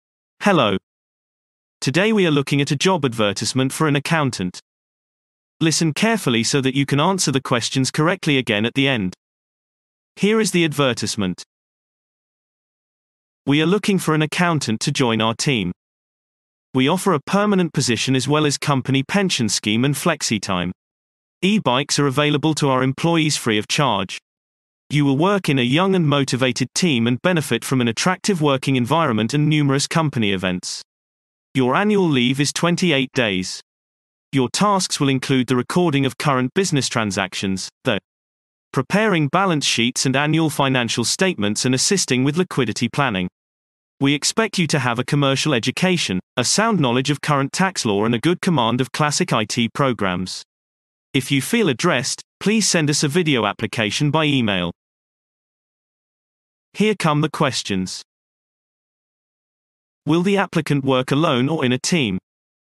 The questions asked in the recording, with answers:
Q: Will the applicant work alone or in a team?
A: Response. The applicant will work in a team.